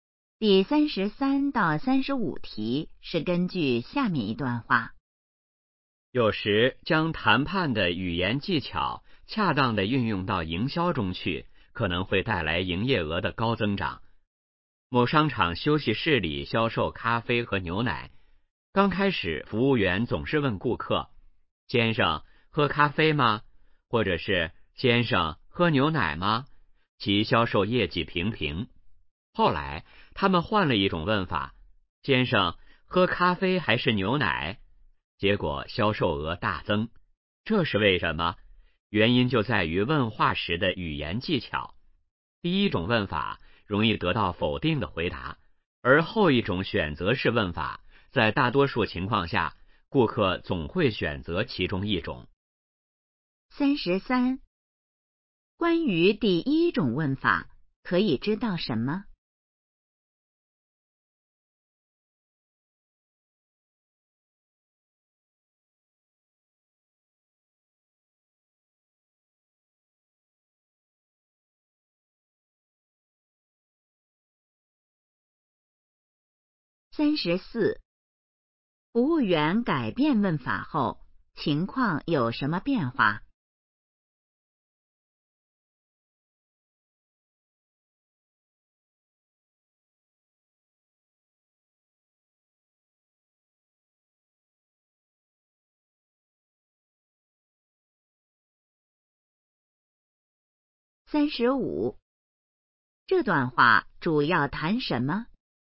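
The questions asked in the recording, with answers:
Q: 关于第一种问法,可以知道什么?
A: 容易得到否定的回答

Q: 服务员改变问法后,情况有什么变化?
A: 销售额大增

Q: 这段话主要谈什么?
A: 问话的语言技巧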